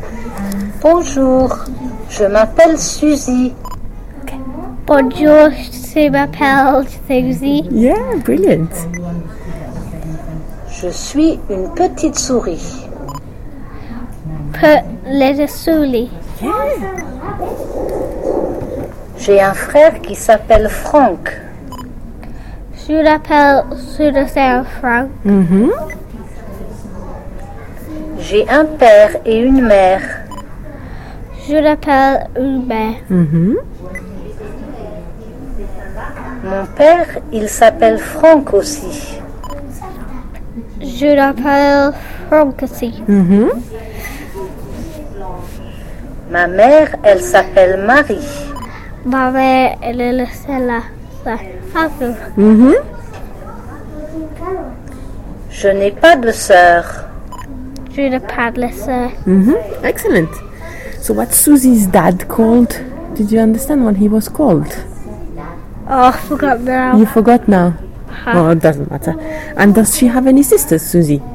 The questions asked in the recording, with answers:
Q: And does she have any sisters, Susie?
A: No.